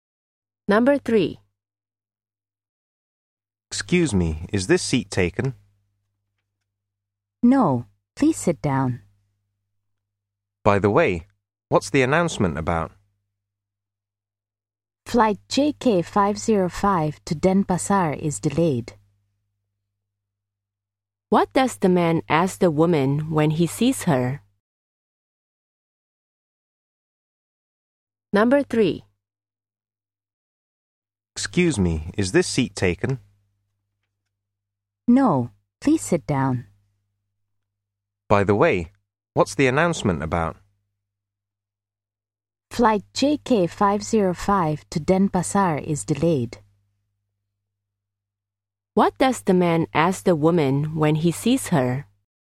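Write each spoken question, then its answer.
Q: What does the man ask the woman when he sees her?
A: Whether the seat is taken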